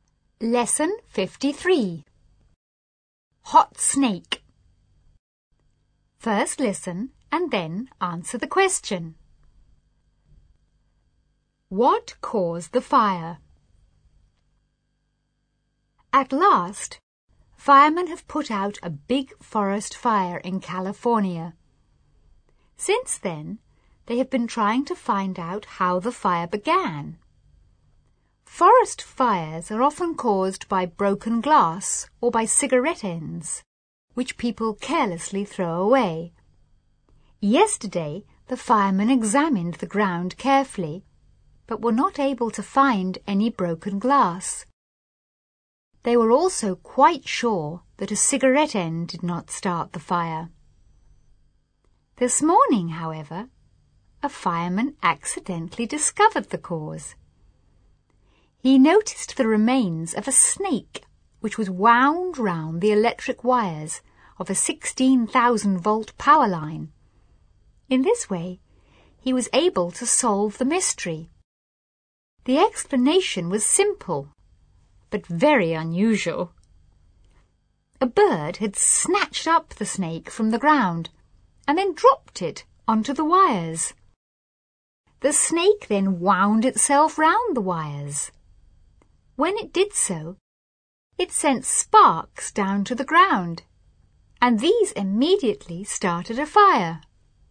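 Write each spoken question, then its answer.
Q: What caused the fire?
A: A snake dropped by a bird onto electric power wires, which sent sparks to the ground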